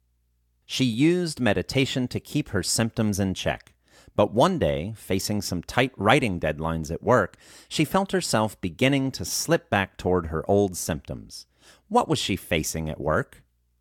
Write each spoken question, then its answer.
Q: What was she facing at work?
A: She was facing tight writing deadlines at work.